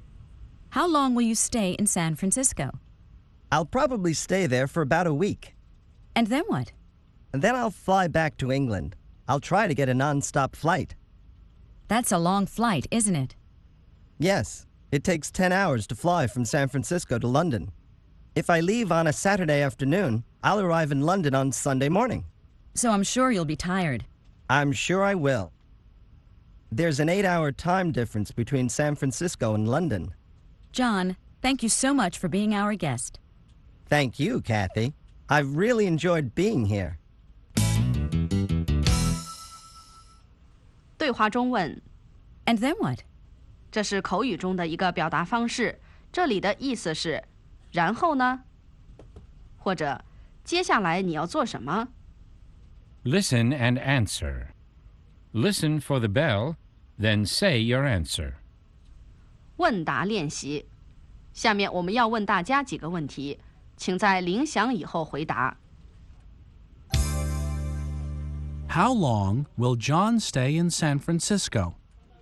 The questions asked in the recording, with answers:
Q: How long will John stay in San Francisco?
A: He'll probably stay there for about a week.